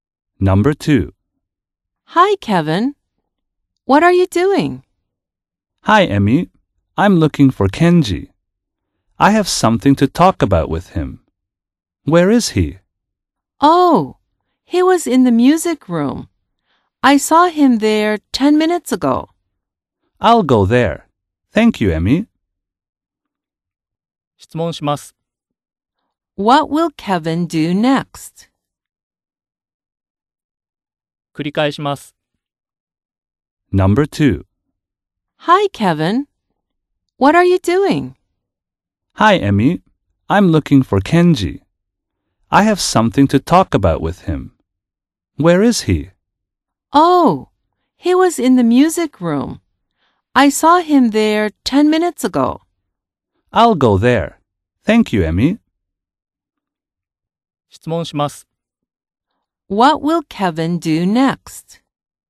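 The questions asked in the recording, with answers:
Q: What will Kevin do next?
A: He will go to the music room to see Kenji.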